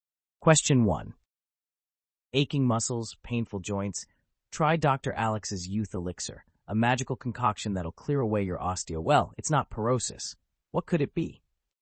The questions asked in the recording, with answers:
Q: Aching muscles, painful joints? Try Dr. Alex's youth elixir, a magical concoction that'll clear away your osteo. Well, it's not porosis. What could it be?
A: The answer is arthritis.